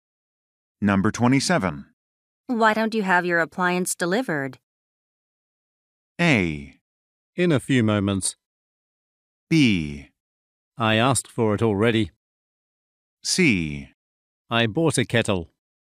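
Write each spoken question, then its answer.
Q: Why don't you have your appliance delivered?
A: B: I asked for it already.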